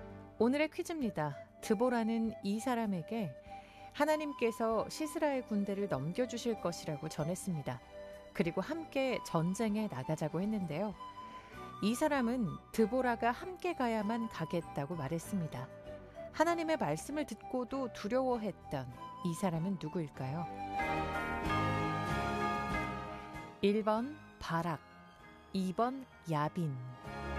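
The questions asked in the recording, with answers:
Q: 하나님의 말씀을 듣고도 두려워했던 이 사람은 누구일까요?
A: 1: 바락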